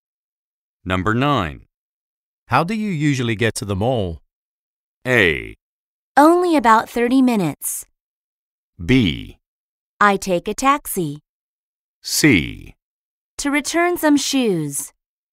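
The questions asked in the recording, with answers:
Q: How do you usually get to the mall?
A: B: I take a taxi.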